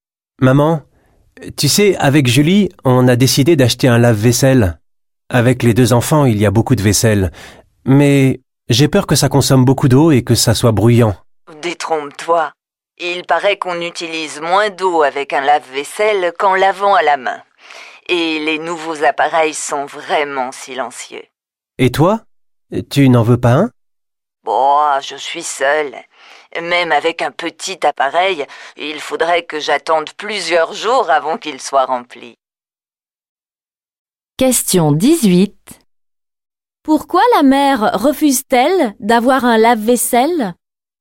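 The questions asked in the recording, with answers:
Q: Pourquoi la mère refuse-t-elle d'avoir un lave-vaisselle?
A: Elle vit seule, il faudrait plusieurs jours pour le remplir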